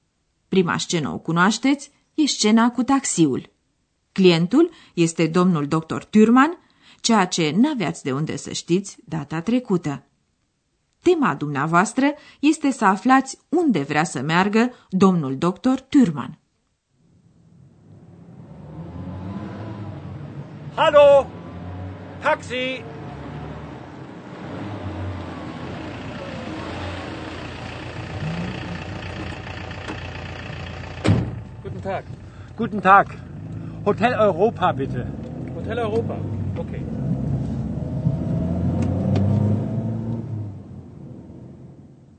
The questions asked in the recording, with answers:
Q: Tema dumneavoastră este să aflați unde vrea să meargă domnul dr.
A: Dr. Thürmann vrea așadar ca șoferul să-l ducă la Hotel Europa, Hotel Europa.